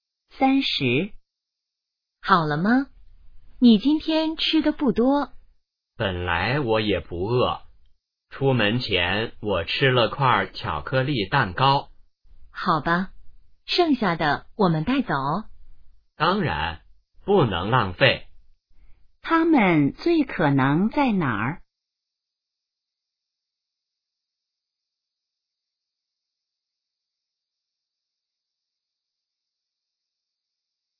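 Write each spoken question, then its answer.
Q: 他们最可能在哪儿?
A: 饭馆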